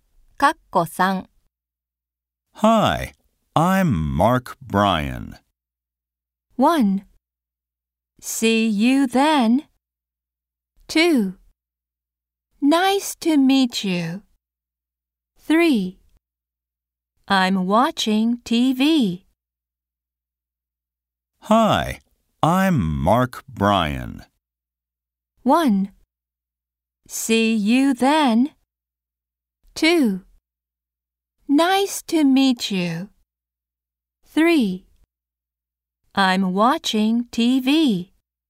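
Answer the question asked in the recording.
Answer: 2: Nice to meet you.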